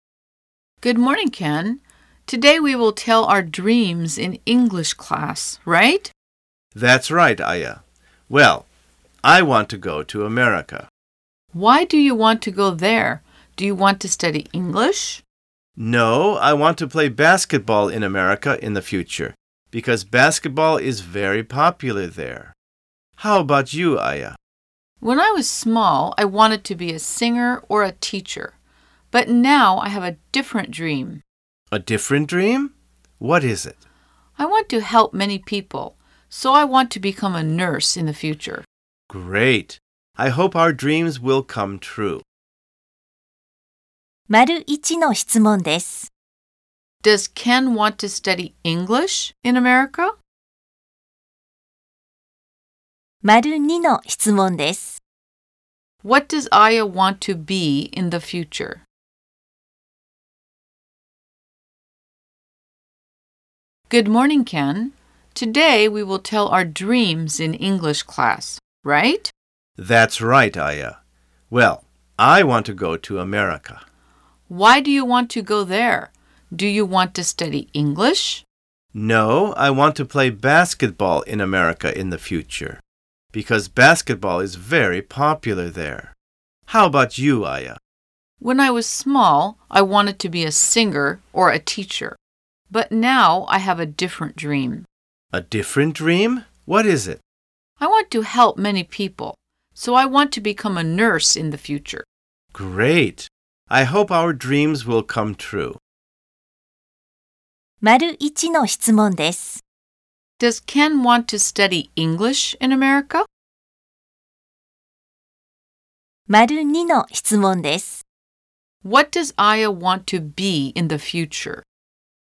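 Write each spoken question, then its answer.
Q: Does Ken want to study English in America?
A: No, he wants to play basketball there.

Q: What does Aya want to be in the future?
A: A nurse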